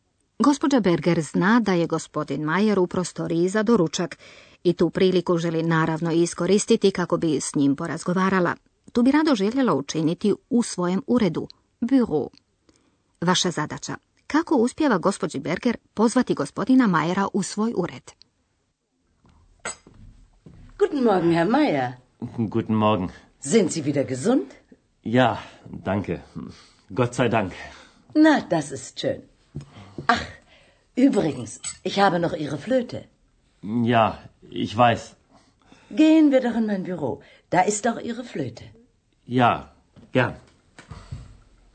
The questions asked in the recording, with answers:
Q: Kako uspjeva gospođi Berger pozvati gospodina Majera u svoj ured?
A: Kao razlog navodi, tamo je i vaša flauta.